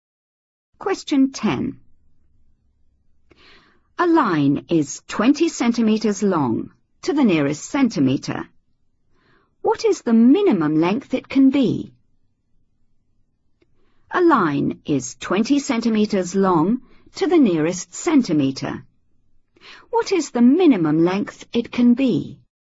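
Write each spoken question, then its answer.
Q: What is the minimum length it can be?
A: 19.5 cm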